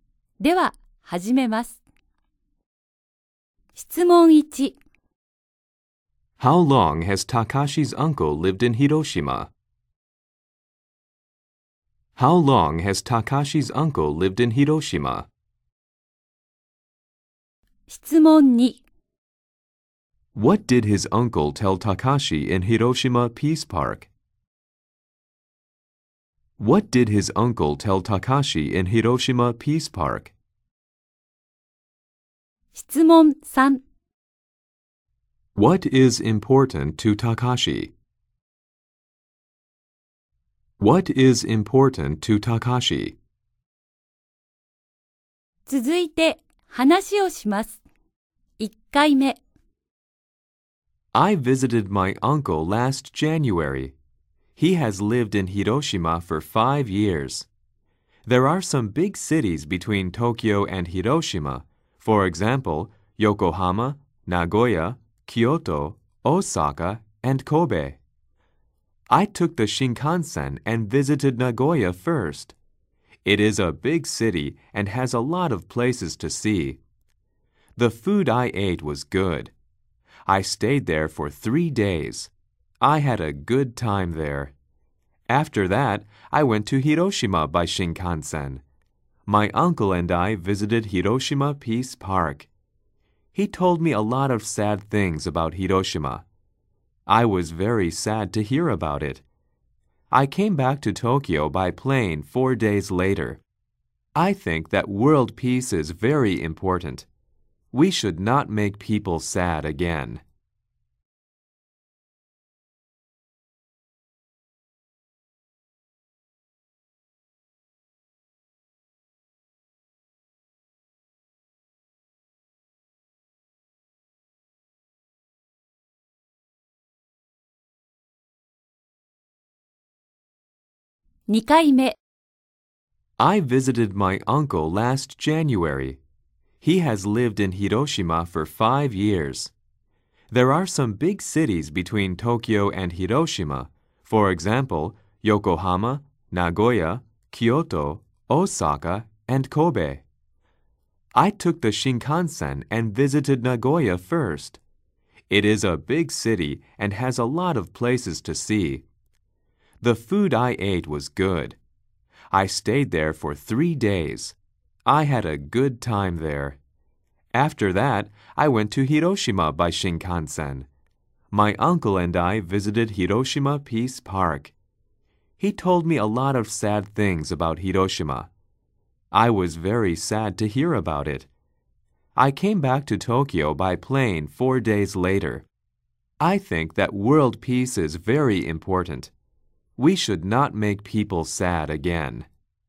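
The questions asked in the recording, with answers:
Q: How long has Takashi's uncle lived in Hiroshima?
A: For 5 years

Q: What did his uncle tell Takashi in Hiroshima Peace Park?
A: A lot of sad things about Hiroshima

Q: What is important to Takashi?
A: World peace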